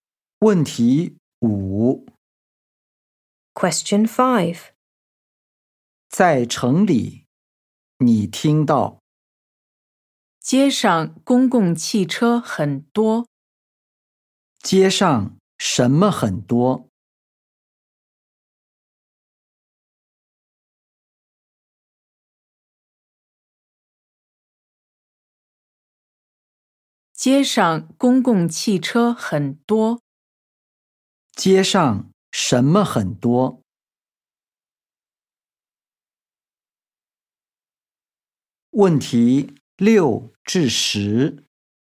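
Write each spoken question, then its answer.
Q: 街上什么很多?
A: 公共汽车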